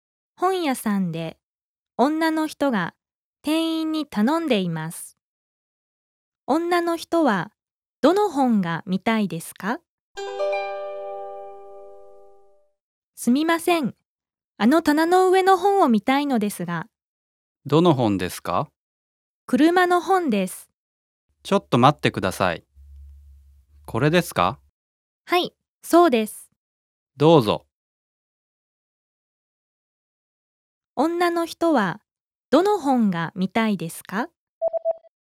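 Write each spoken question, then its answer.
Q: 女の人はどの本が見たいですか?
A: 車の本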